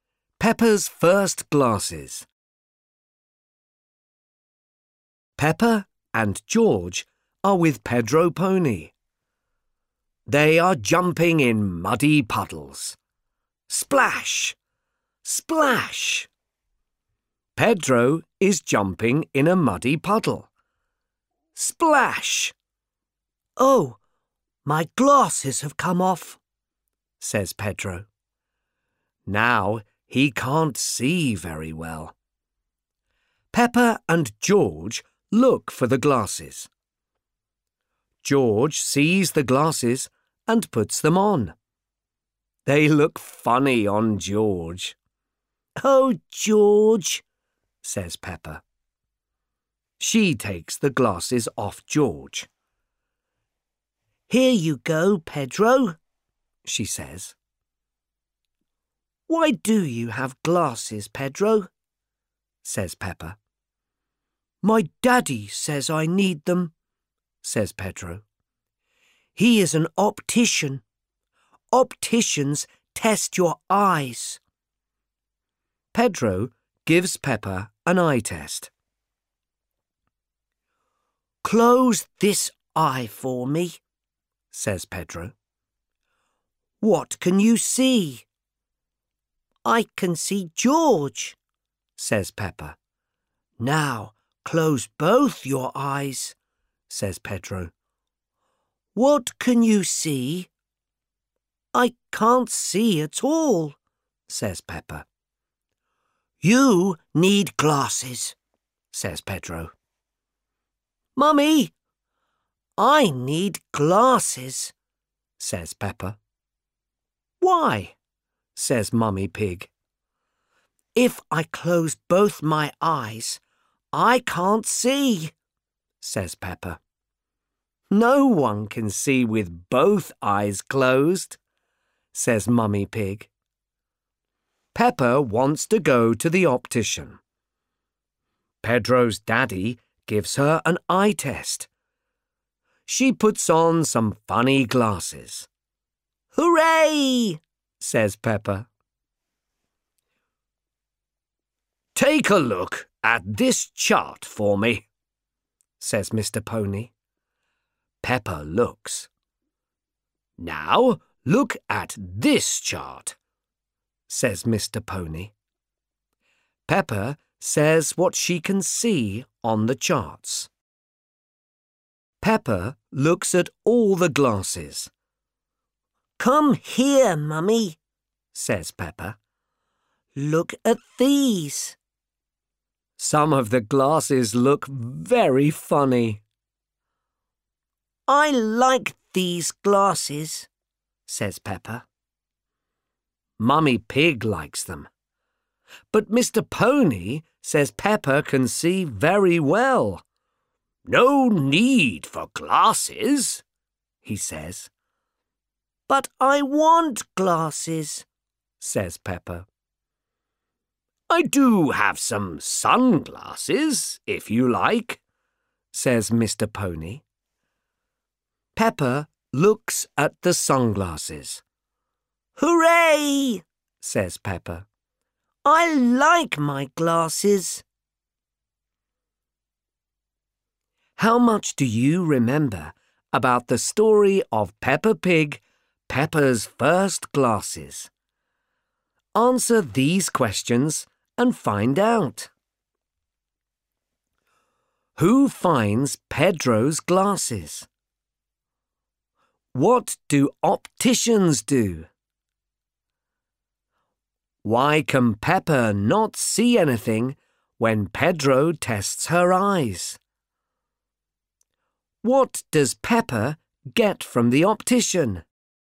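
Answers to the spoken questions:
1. George
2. They test your eyes
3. Because both her eyes are closed
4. Sunglasses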